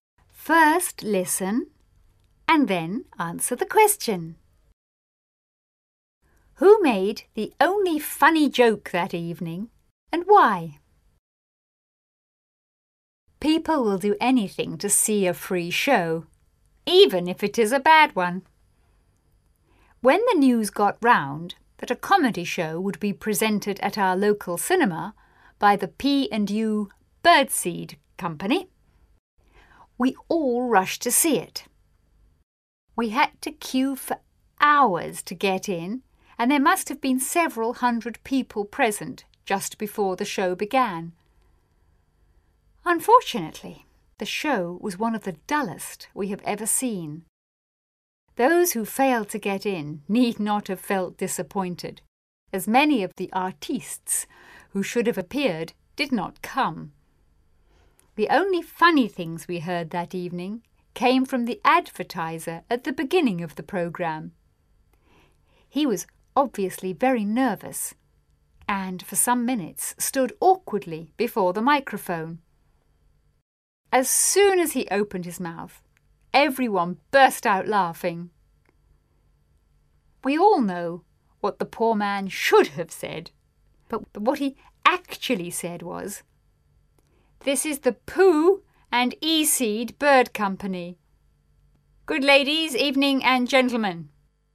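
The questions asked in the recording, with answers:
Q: Who made the only funny joke that evening and why?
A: The advertiser (announcer) at the start of the programme, because he was nervous and mixed up his words.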